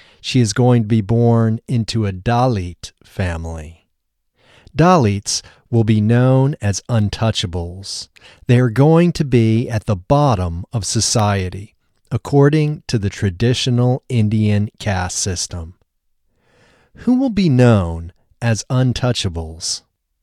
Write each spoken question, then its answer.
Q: Who will be known as untouchables?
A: Dalits will be known as untouchables.